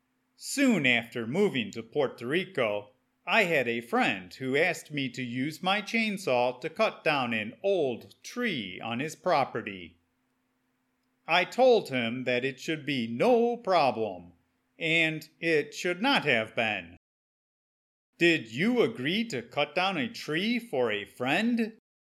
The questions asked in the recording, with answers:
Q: Did you agree to cut down a tree for a friend?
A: Yes, I had a chainsaw, so I decided that I could help out.